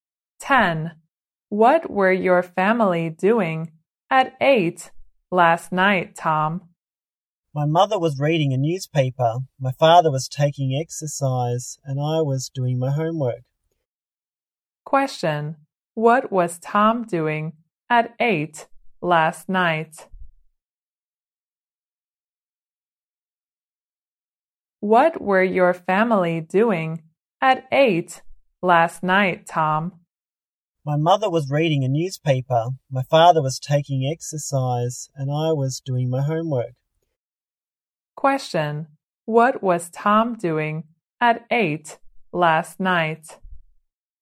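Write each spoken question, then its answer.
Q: Question. What was Tom doing at 8 last night?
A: Doing his homework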